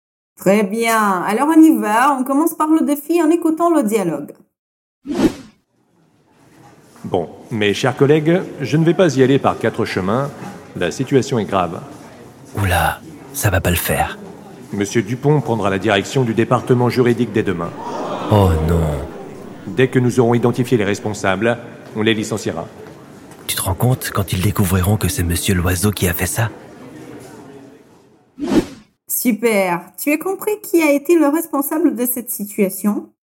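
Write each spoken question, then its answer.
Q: Super, tu as compris qui a été le responsable de cette situation ?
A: Monsieur Loiseau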